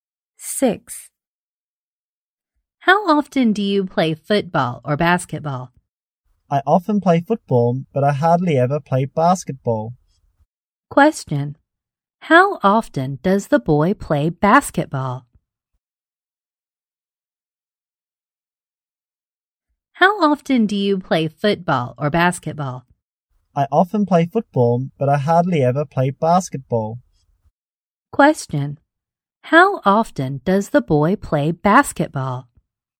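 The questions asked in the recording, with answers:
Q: How often does the boy play basketball?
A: Hardly ever.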